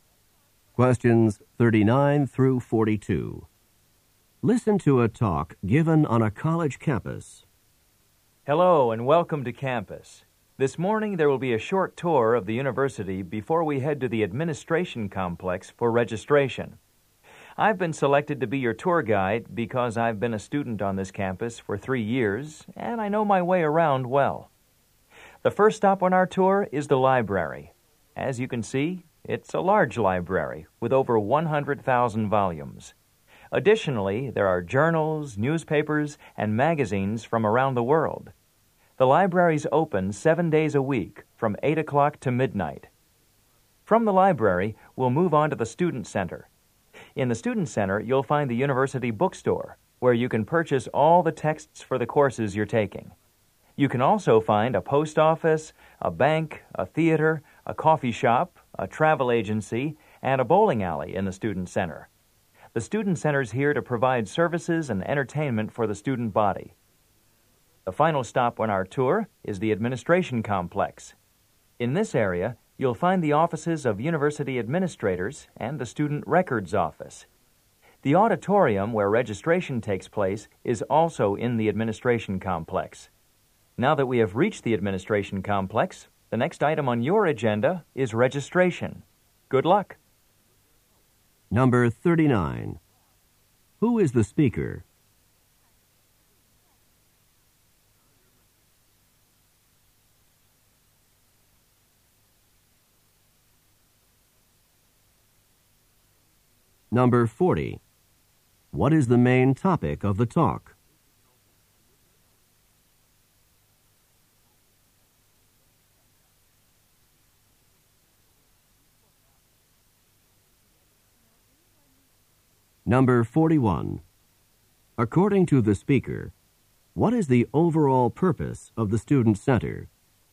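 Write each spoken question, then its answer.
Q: Who is the speaker?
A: A student tour guide

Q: What is the main topic of the talk?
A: A campus tour

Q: According to the speaker, what is the overall purpose of the Student Center?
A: To provide services and entertainment for students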